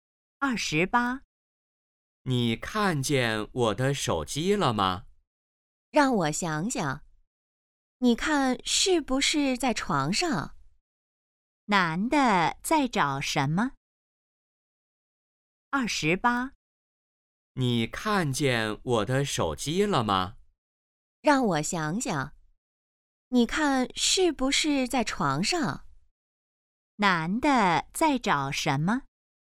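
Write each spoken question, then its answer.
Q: 男的在找什么?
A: 手机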